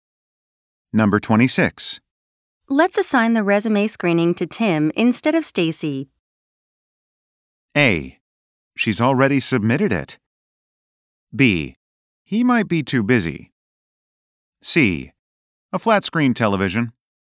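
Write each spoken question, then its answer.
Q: Let's assign the resume screening to Tim instead of Stacy.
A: B: He might be too busy.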